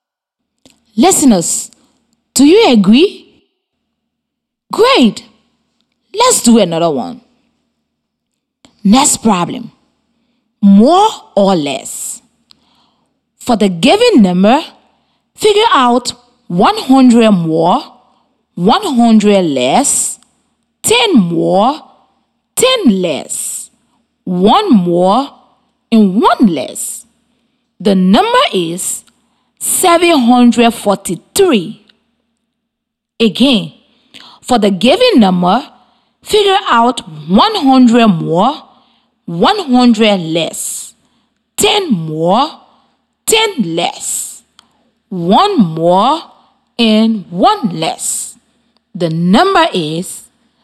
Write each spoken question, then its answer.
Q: For the given number, figure out 100 more, 100 less, 10 more, 10 less, 1 more, and 1 less.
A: 100 more than 743 is 843.